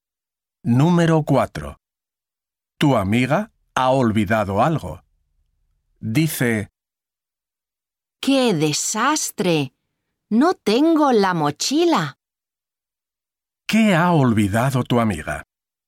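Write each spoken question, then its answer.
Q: ¿Qué ha olvidado tu amiga?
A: La mochila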